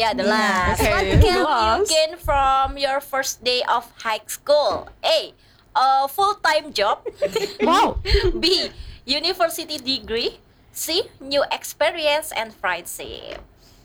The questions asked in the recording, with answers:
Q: You gain from your first day of high school?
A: Experience,